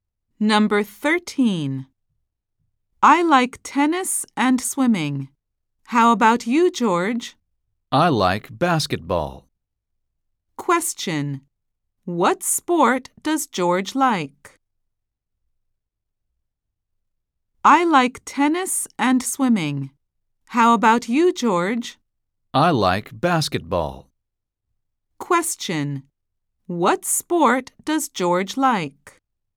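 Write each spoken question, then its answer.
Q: What sport does George like?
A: Basketball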